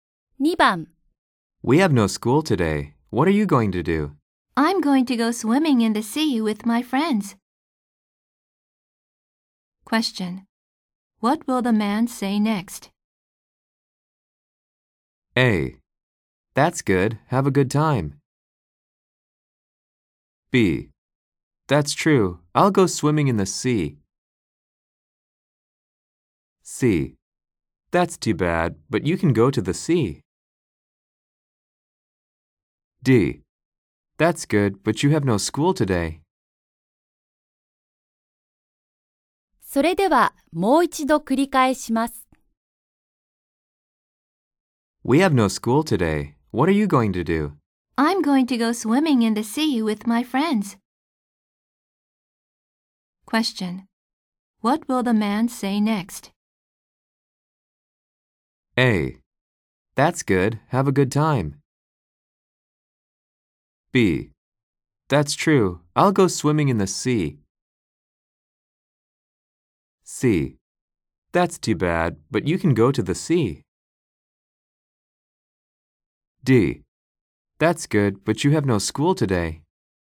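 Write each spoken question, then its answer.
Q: What will the man say next?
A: A: That's good. Have a good time.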